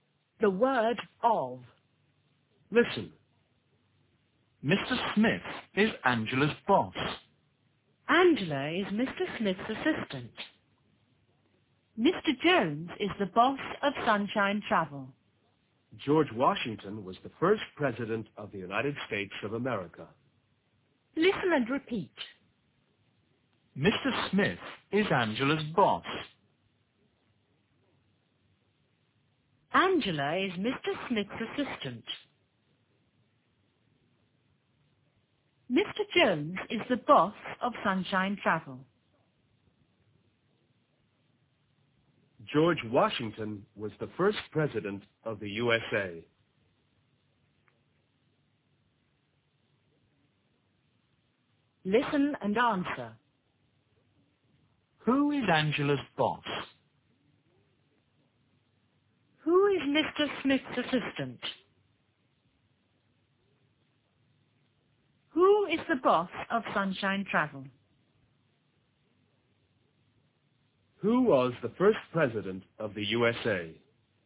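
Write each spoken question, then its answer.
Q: Who is Angela's boss?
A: Mr. Smith

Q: Who is Mr. Smith's assistant?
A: Angela

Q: Who is the boss of Sunshine Travel?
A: Mr. Jones

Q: Who was the first president of the USA?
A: George Washington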